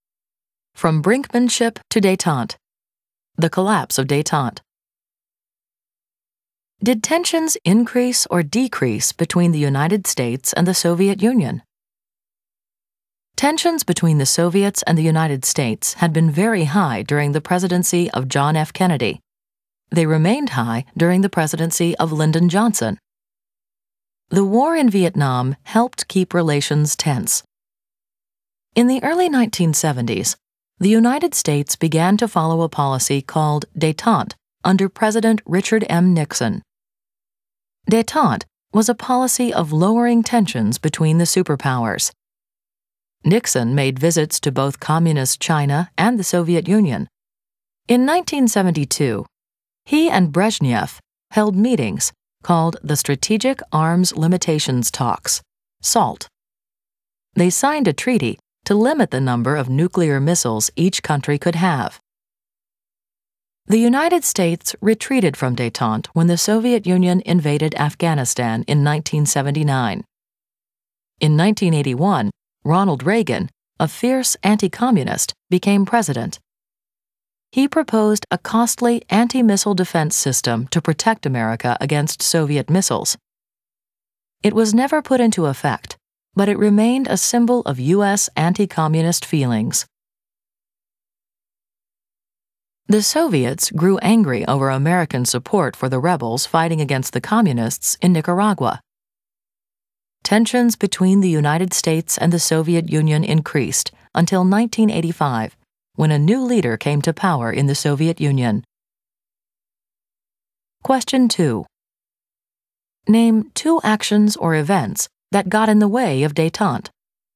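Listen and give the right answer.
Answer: The Soviet invasion of Afghanistan in 1979 and Reagan's anti-missile defense plan (also U.S. support for Nicaraguan rebels)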